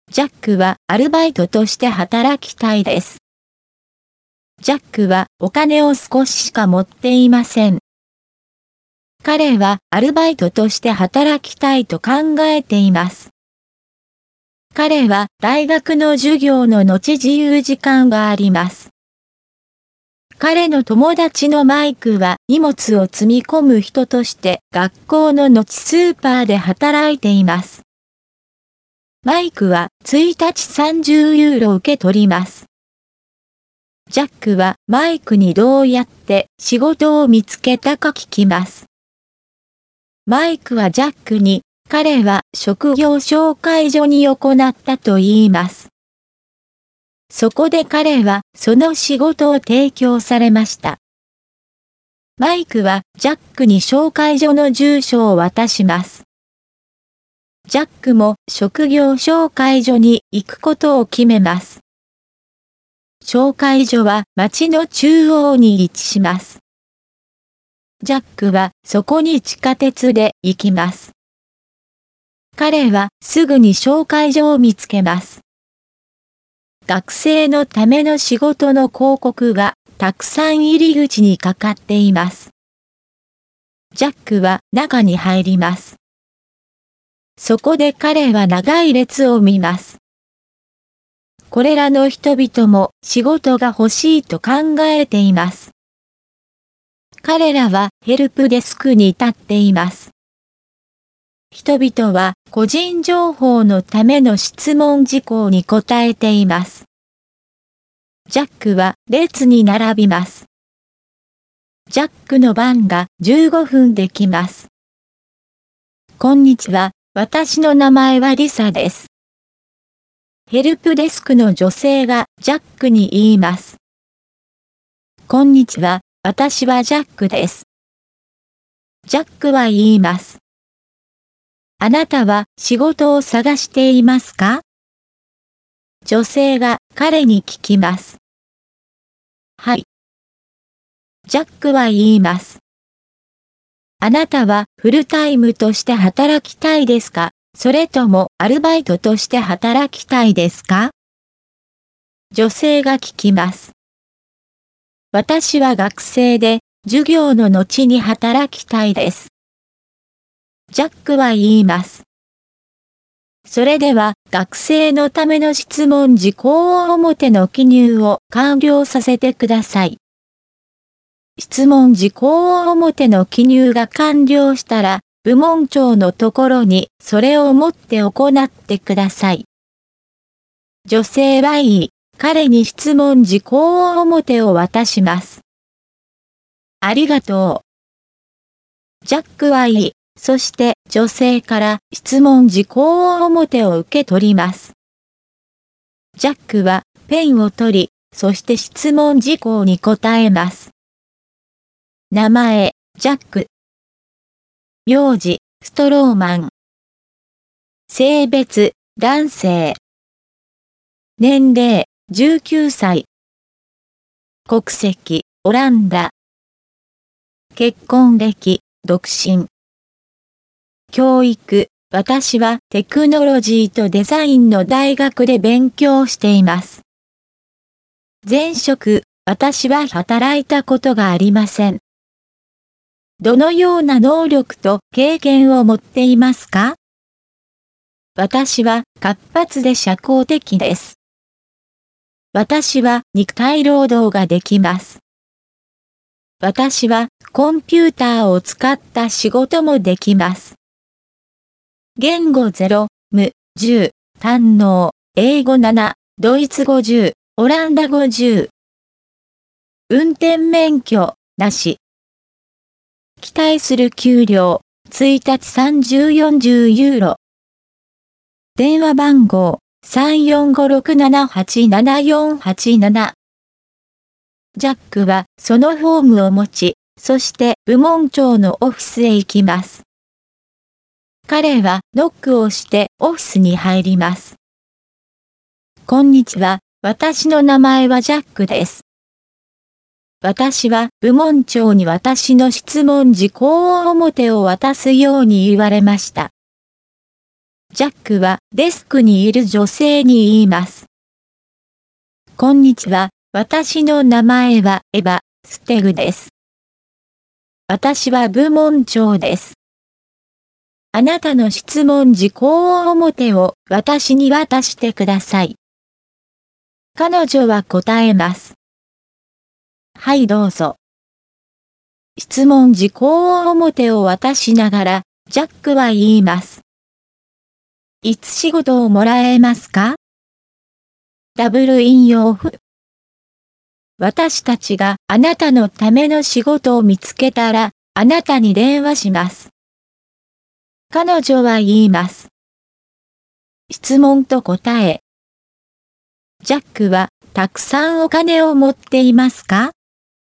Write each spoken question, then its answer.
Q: ジャックはたくさんお金を持っていますか?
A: いいえ、ジャックはお金を少ししか持っていません。